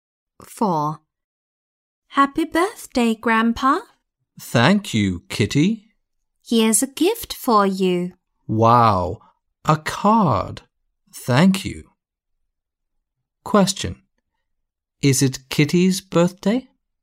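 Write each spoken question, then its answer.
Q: Is it Kitty's birthday?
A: No, it's Grandpa's birthday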